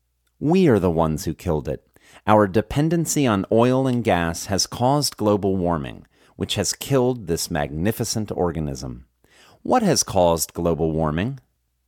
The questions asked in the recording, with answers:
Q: What has caused global warming?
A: Our dependency on gas and oil has caused global warming.